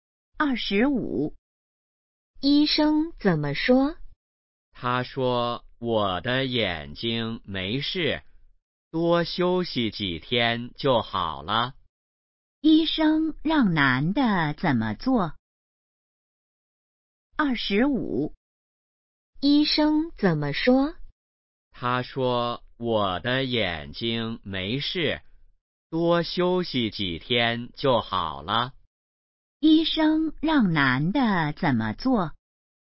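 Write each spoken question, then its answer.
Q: 医生让男的怎么做?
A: 多休息几天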